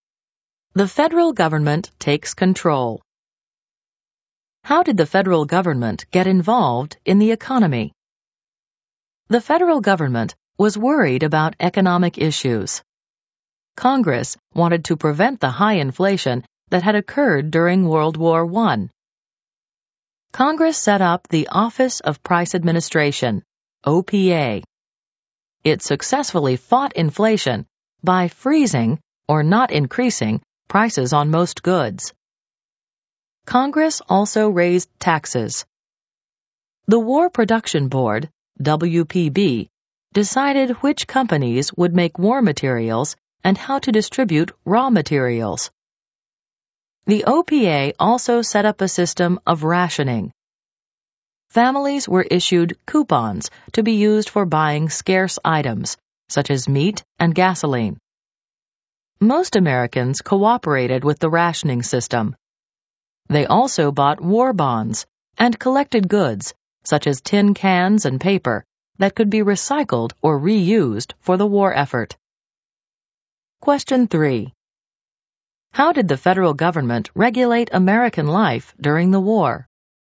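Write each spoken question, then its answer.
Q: How did the federal government regulate American life during the war?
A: The OPA froze prices to fight inflation and set up rationing with coupons. Congress raised taxes, and the WPB decided which companies made war materials and how raw materials were distributed.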